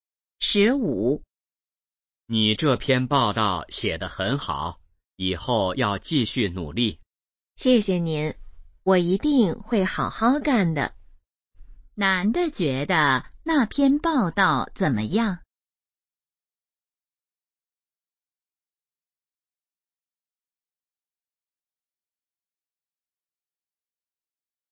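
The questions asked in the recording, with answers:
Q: 男的觉得那篇报道怎么样?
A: 写得很好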